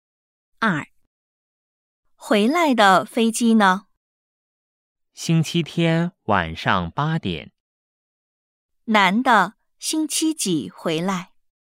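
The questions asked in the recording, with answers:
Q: 男的星期几回来?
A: 星期天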